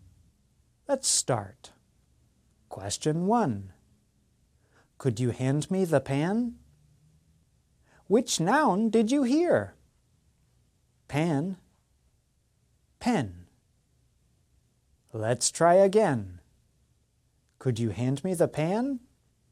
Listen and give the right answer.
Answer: The answer is pan.